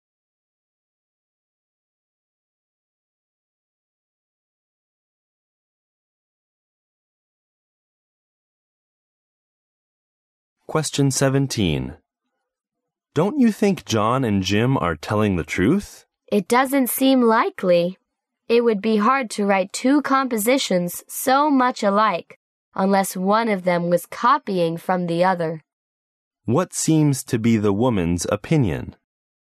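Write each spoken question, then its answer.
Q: What seems to be the woman's opinion?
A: John and Jim aren't telling the truth; one copied from the other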